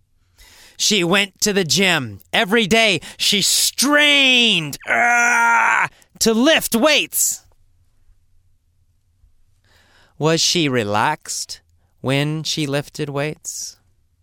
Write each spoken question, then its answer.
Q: Was she relaxed when she lifted weights?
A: No, she was not relaxed.